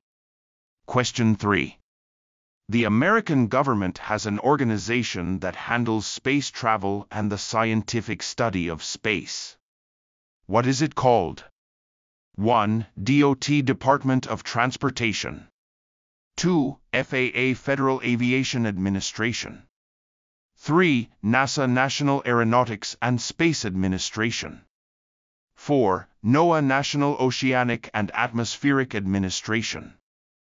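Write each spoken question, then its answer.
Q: What is it called?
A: 3: NASA, National Aeronautics and Space Administration.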